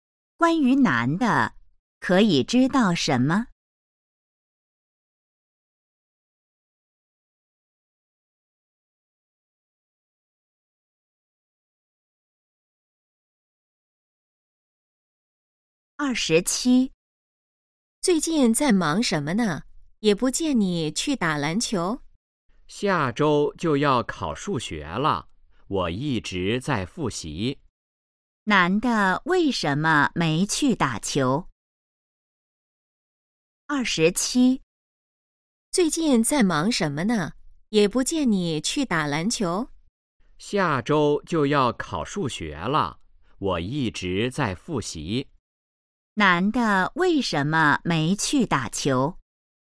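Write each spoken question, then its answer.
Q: 男的为什么没去打球?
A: 在复习,准备数学考试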